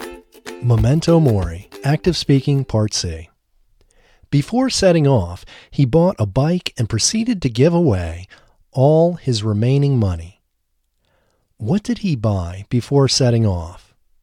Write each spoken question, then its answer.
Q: What did he buy before setting off?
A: He bought a bike before setting off.